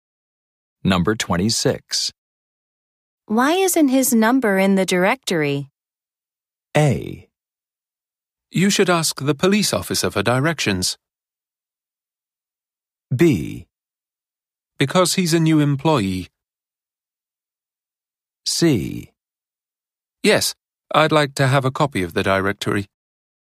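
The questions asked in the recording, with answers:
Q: Why isn't his number in the directory?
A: B: Because he's a new employee.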